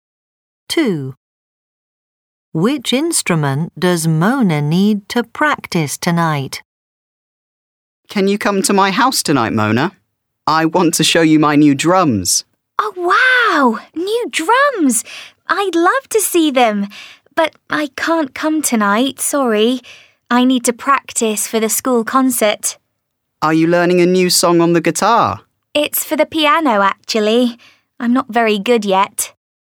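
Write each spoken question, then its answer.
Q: Which instrument does Mona need to practice tonight?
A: the piano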